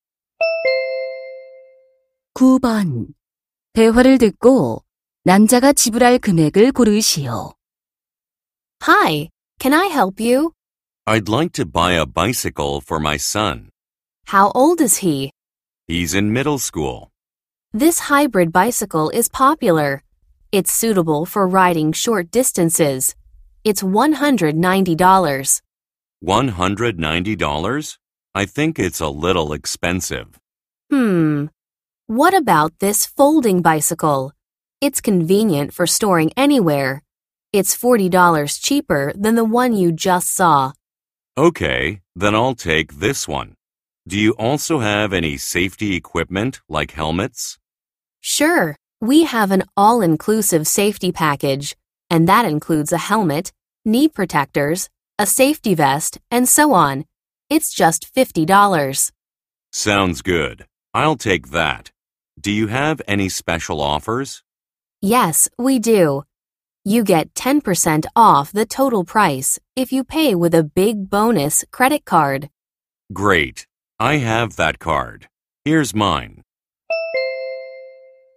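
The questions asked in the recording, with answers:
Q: 대화를 듣고 남자가 지불할 금액을 고르시오.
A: $180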